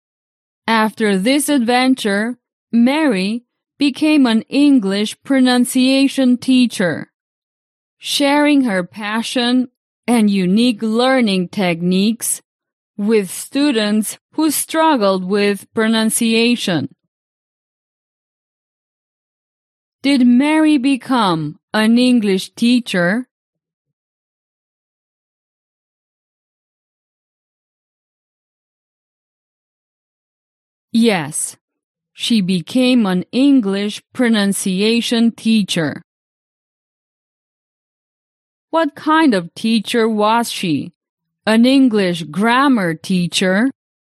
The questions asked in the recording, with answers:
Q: What kind of teacher was she?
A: No. Mary didn't teach grammar.